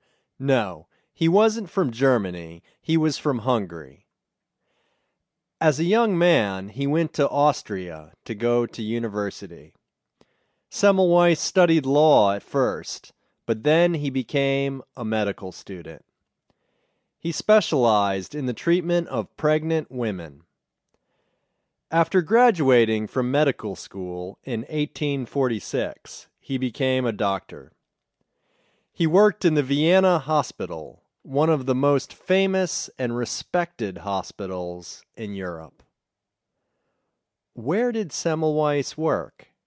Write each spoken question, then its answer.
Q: Where did Semmelweis work?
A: He worked in the Vienna Hospital.